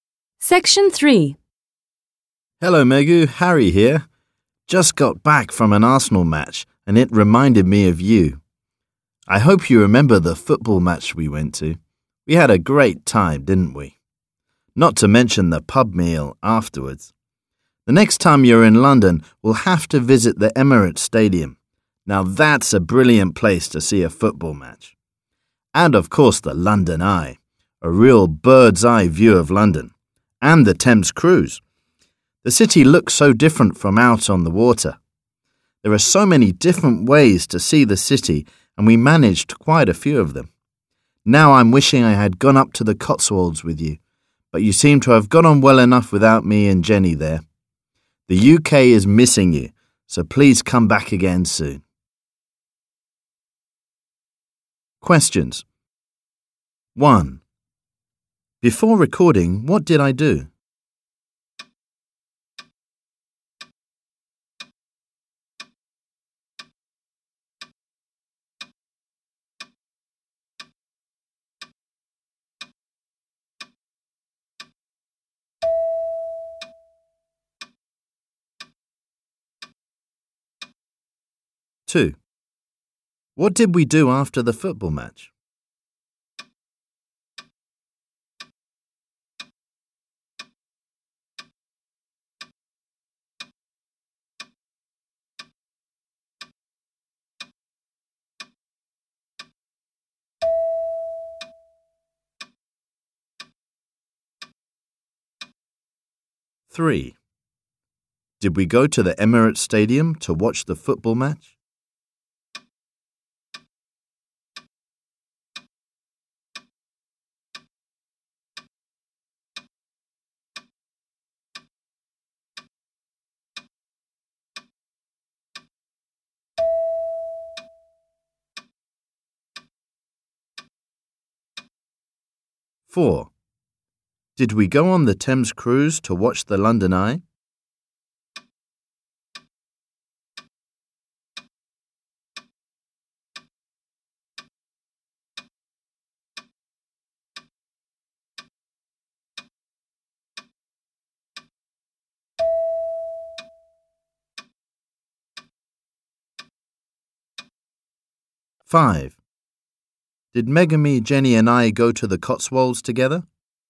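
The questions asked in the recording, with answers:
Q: Before recording, what did I do?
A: He went to an Arsenal football match.

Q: What did we do after the football match?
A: They had a pub meal.

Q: Did we go to the Emirates Stadium to watch the football match?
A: No, they will visit it next time.

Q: Five. Did Megami, Jenny, and I go to the Cotswolds together?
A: No, Megu went without Harry and Jenny.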